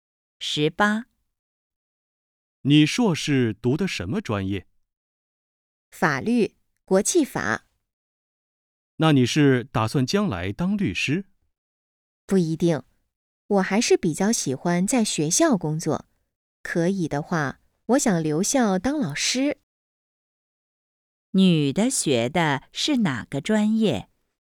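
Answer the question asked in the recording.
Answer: 法律(国际法)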